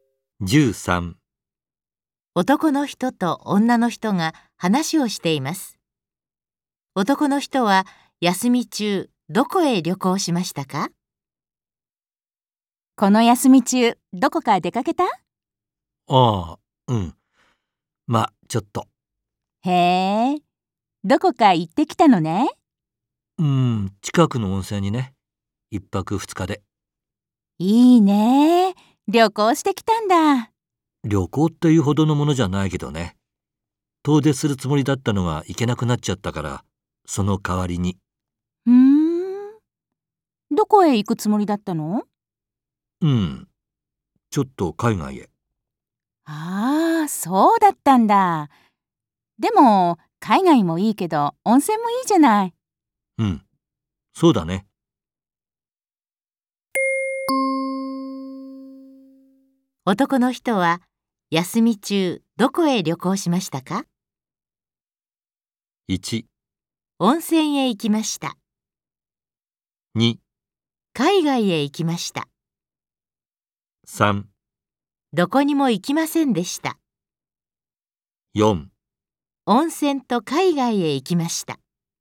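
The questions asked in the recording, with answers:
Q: 男の人は休み中どこへ旅行しましたか?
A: 1: 温泉へ行きました。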